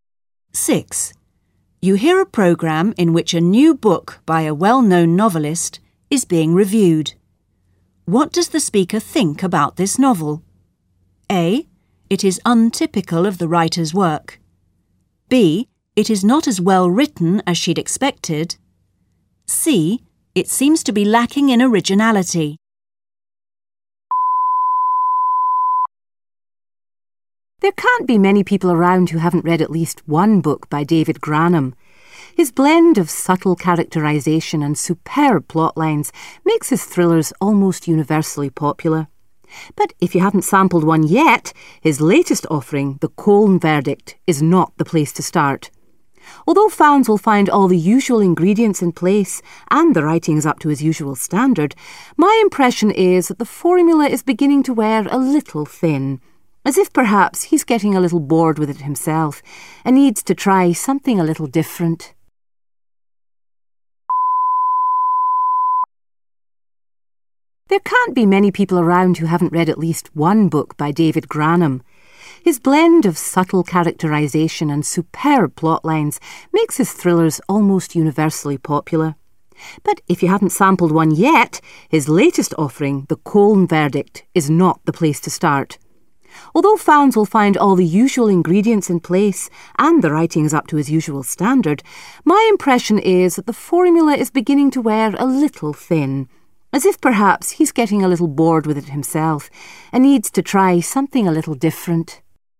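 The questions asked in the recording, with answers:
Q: What does the speaker think about this novel?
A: C: It seems to be lacking in originality.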